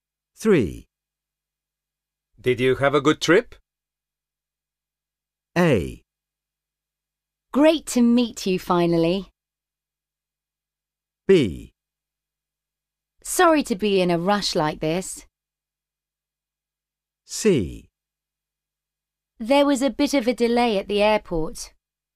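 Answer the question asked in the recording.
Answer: C: There was a bit of a delay at the airport.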